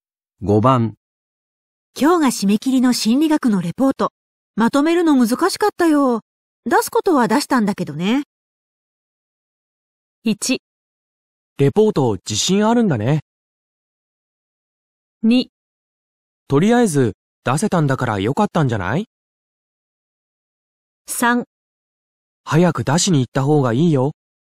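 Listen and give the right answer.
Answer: 2: とりあえず出せたんだからよかったんじゃない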